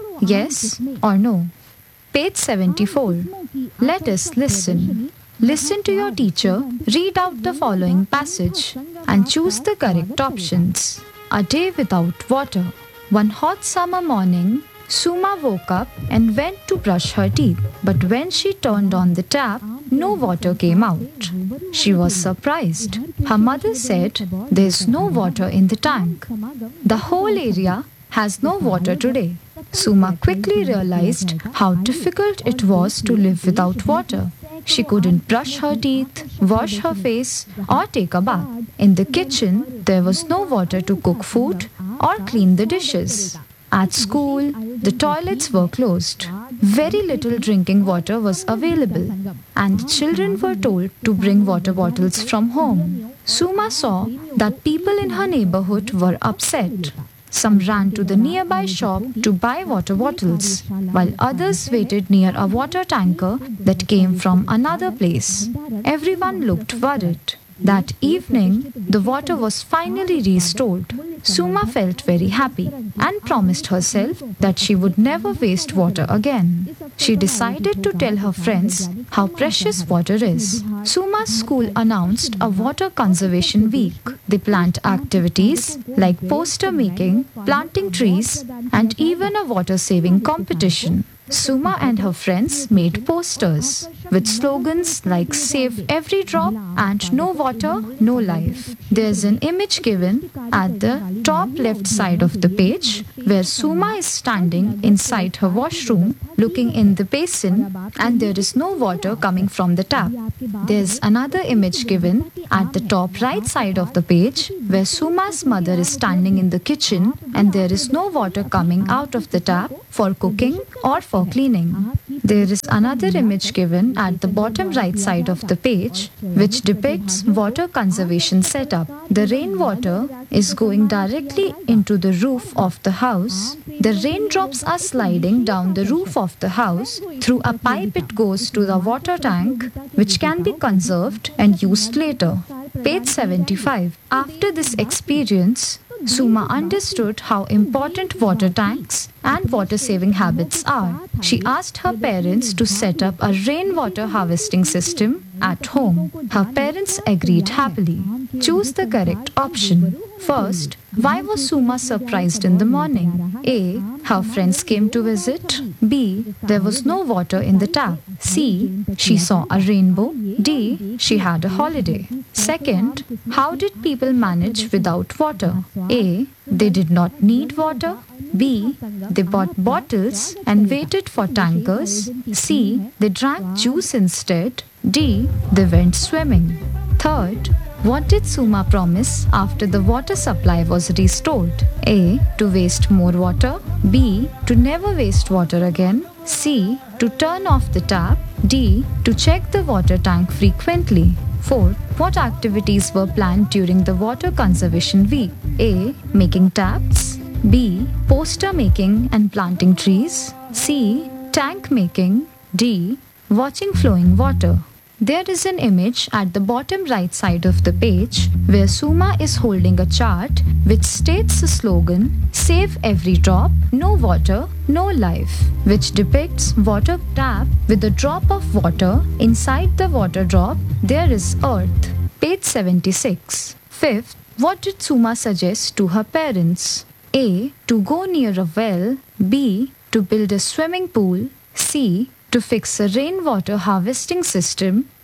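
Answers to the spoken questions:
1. B: There was no water in the tap.
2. B: They bought bottles and waited for tankers.
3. B: To never waste water again.
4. B: Poster making and planting trees.
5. C: To fix a rainwater harvesting system.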